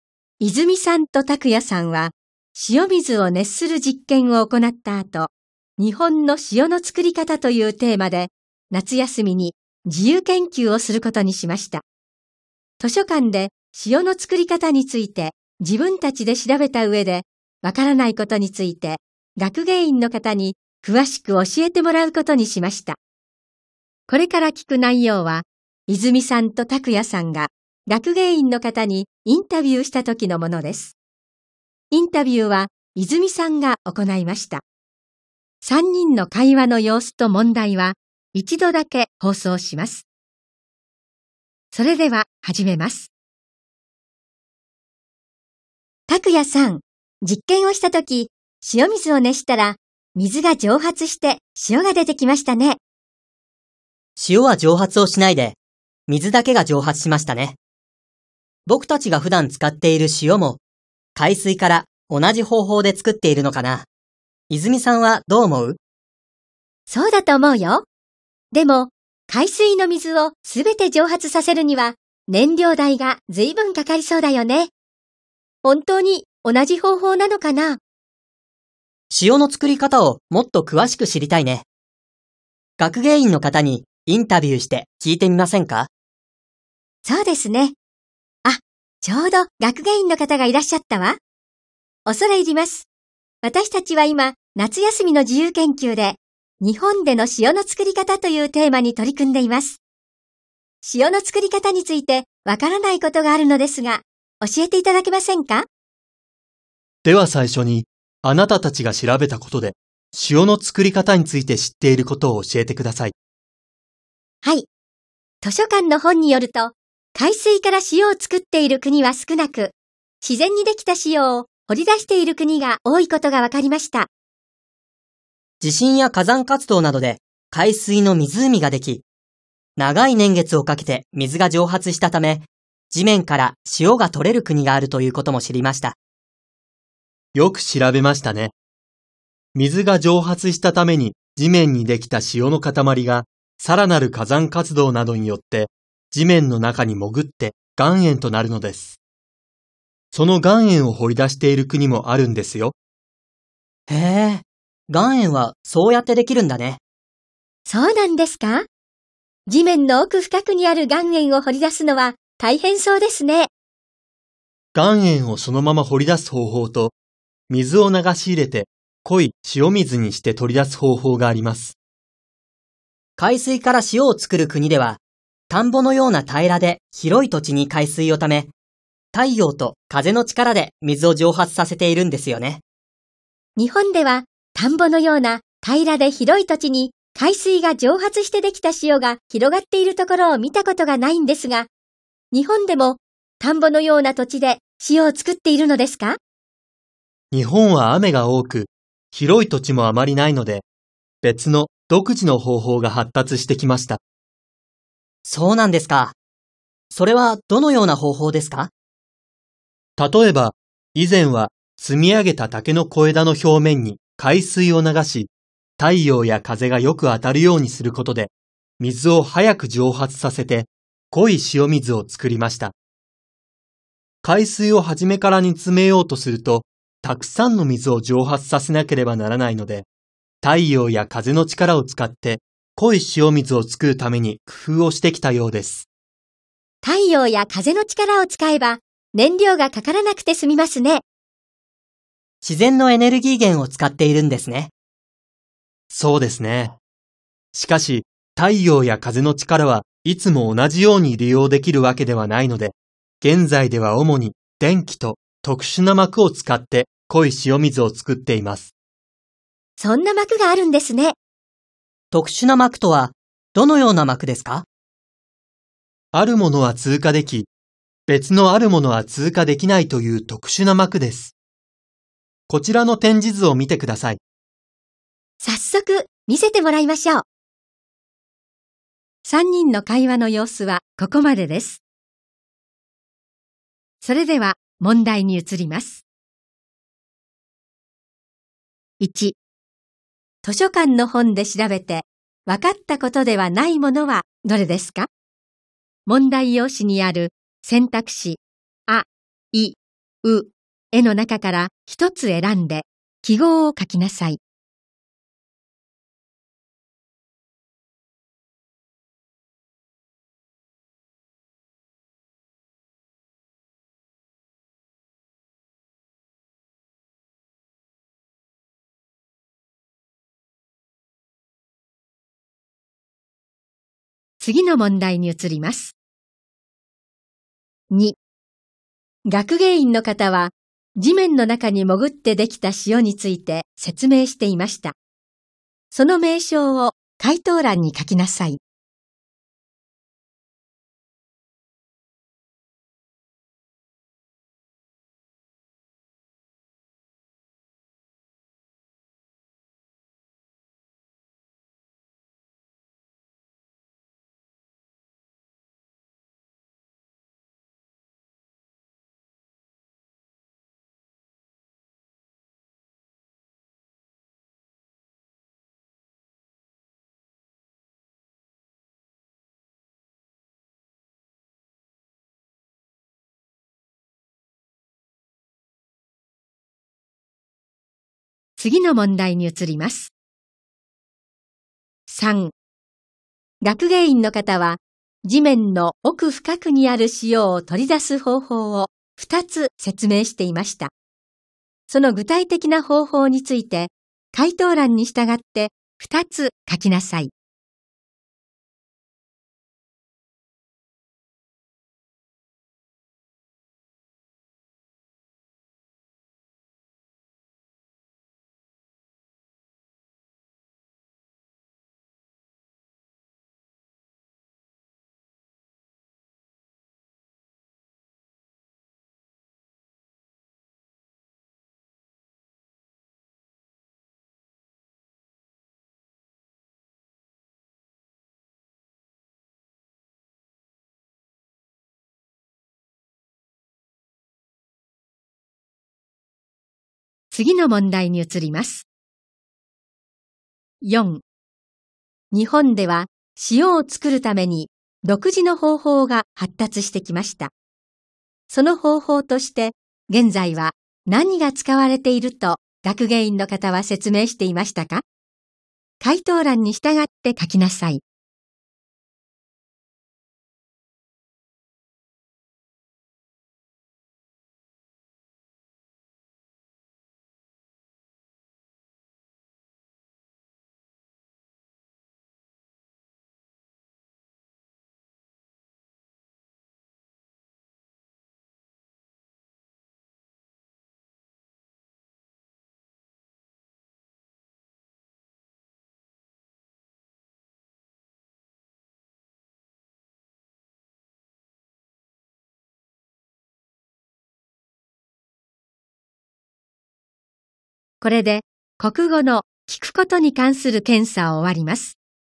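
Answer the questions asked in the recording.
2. 岩塩
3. 岩塩をそのまま掘り出す方法と、水を流し入れて濃い塩水にして取り出す方法
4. 電気と特殊な膜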